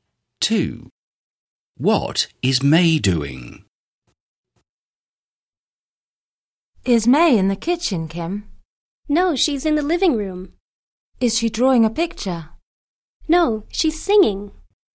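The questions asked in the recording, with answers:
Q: What is May doing?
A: singing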